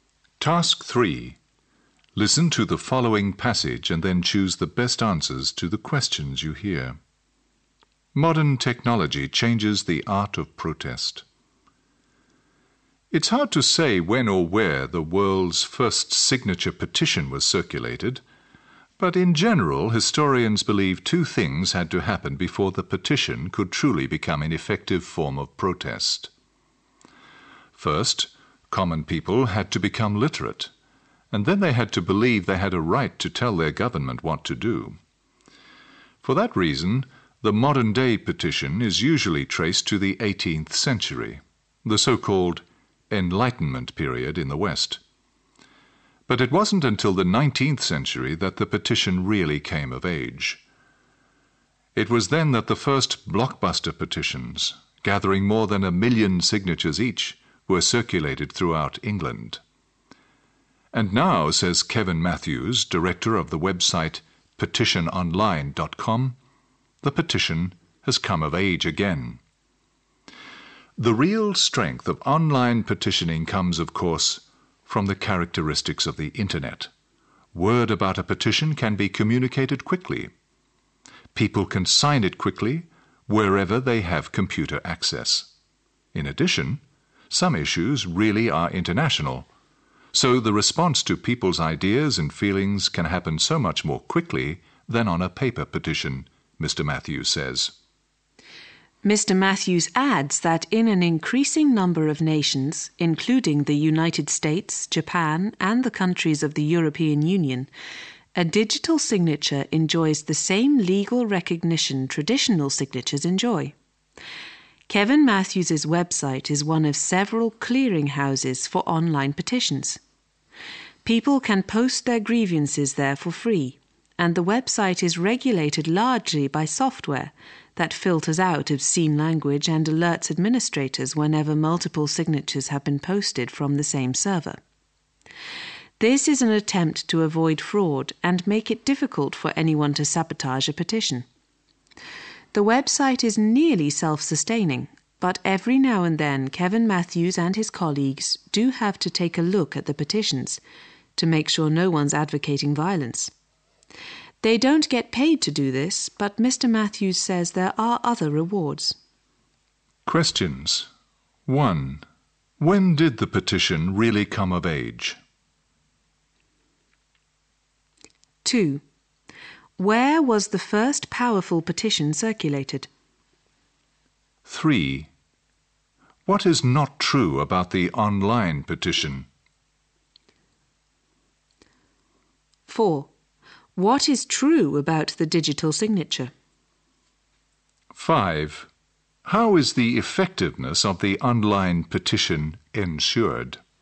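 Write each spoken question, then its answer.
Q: When did the petition really come of age?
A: In the 19th century

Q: Where was the first powerful petition circulated?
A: In England

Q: What is true about the digital signature?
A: In more and more nations, it has the same legal recognition as a traditional signature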